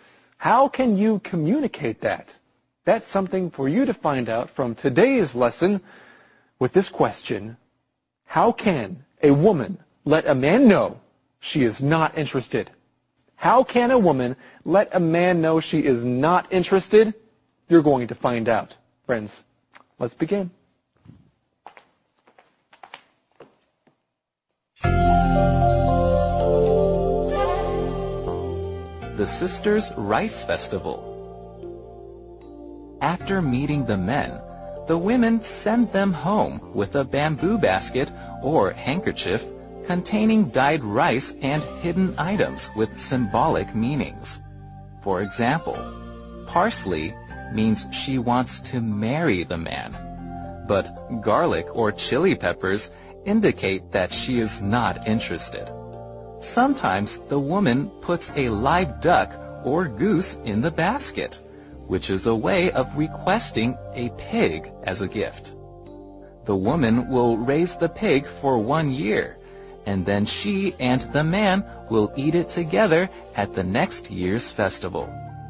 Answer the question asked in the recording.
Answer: But garlic or chili peppers indicate that she is not interested.